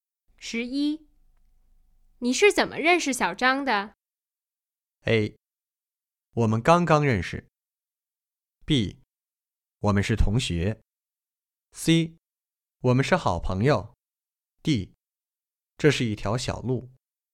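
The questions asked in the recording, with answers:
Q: 你是怎么认识小张的?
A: B: 我们是同学。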